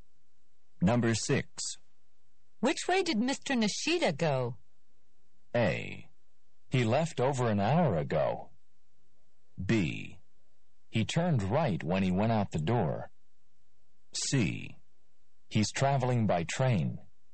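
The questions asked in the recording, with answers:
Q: Which way did Mr. Nishida go?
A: B: He turned right when he went out the door.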